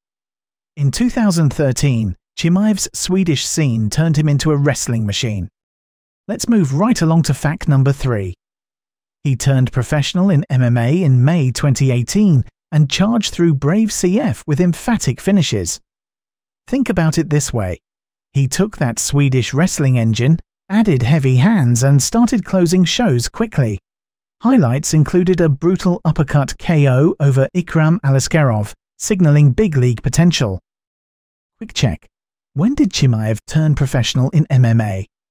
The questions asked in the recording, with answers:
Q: When did Chimaev turn professional in MMA?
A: Correct answer, 2018.